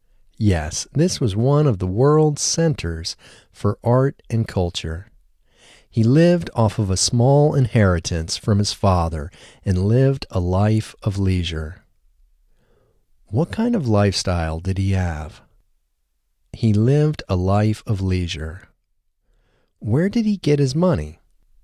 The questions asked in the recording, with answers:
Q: Where did he get his money?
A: He got his money from a small inheritance from his father.